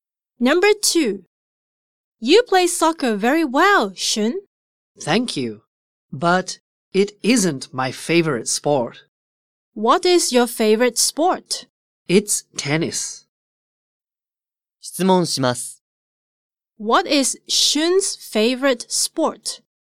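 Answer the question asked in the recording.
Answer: Tennis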